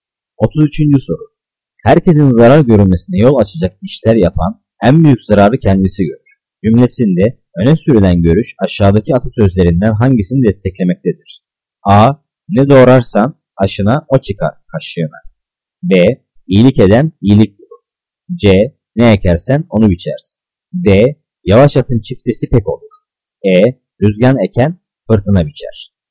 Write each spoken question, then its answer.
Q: Cümlesinde öne sürülen görüş aşağıdaki atasözlerinden hangisini desteklemektedir?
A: Cevap E. Rüzgar eken fırtına biçer.